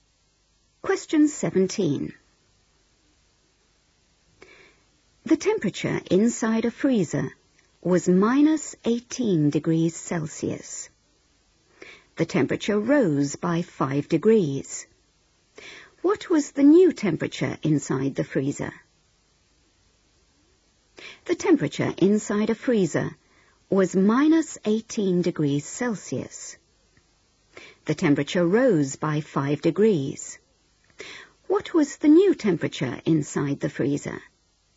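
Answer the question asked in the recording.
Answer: -13°C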